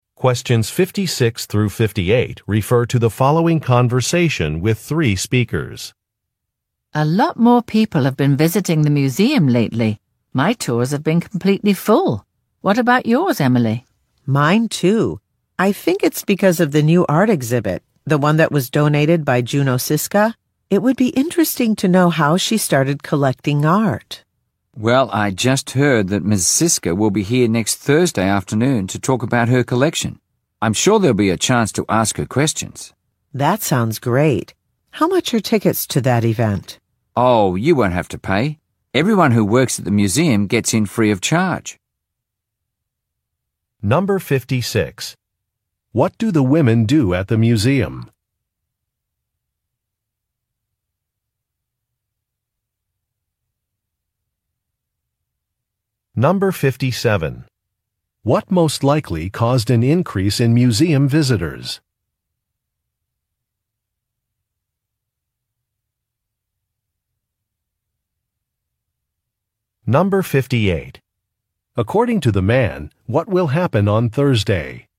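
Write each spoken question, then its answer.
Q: What do the women do at the museum?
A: They lead tours (tour guides)

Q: What most likely caused an increase in museum visitors?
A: A new art exhibit donated by Juno Siska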